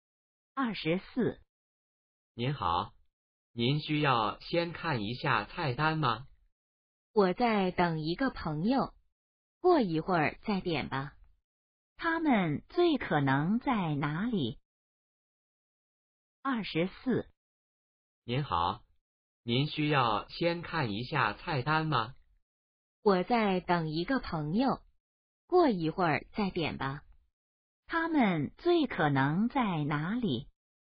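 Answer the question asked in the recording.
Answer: 饭馆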